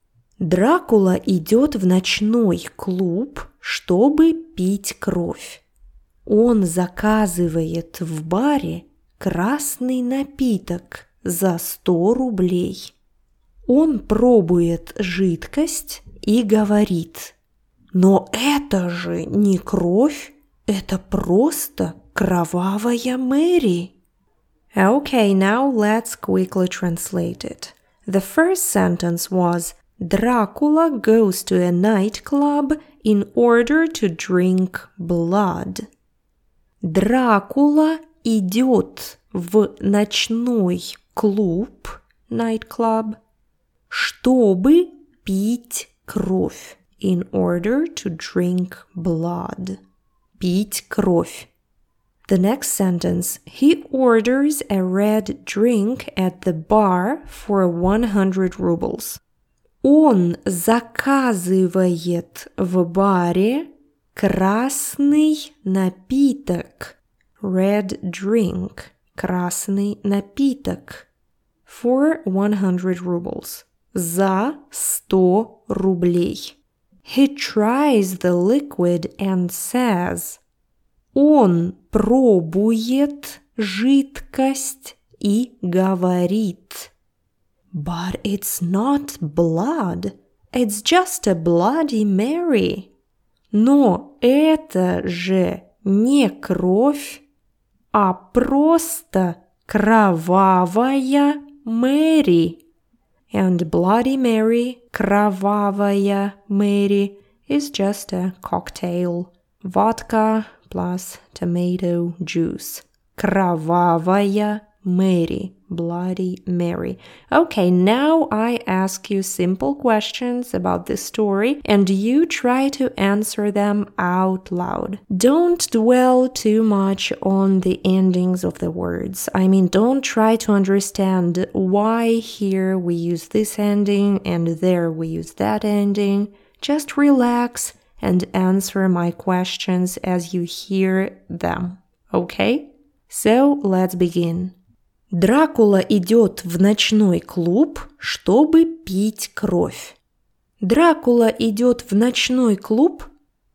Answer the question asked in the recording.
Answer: Да, граф Дракула идет в ночной клуб.